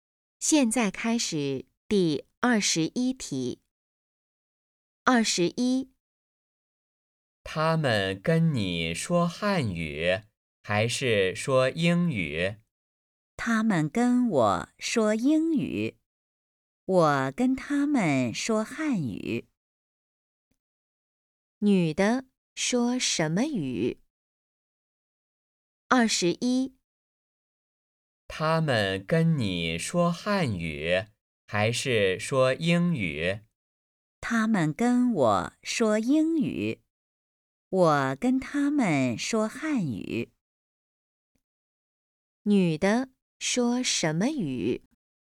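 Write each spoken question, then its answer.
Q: 女的说什么语?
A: 汉语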